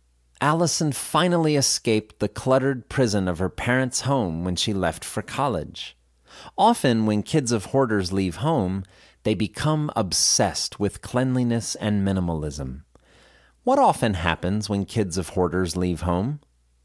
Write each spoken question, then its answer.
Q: What often happens when kids of hoarders leave home?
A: When kids of hoarders leave home, they often become obsessed with cleanliness and minimalism.